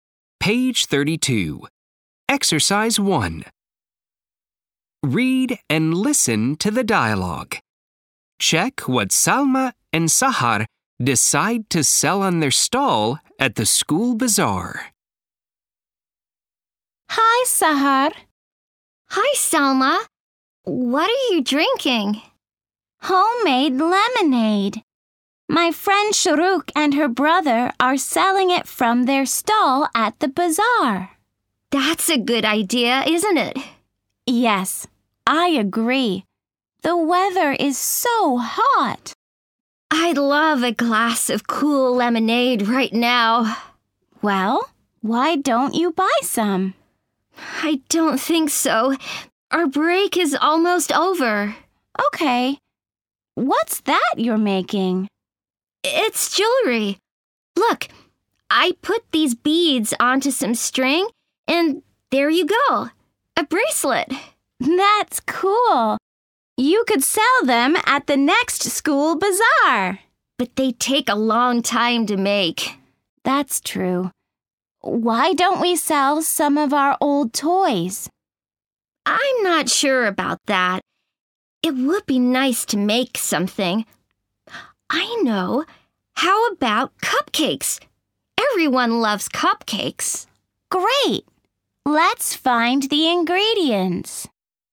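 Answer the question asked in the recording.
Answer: Cupcakes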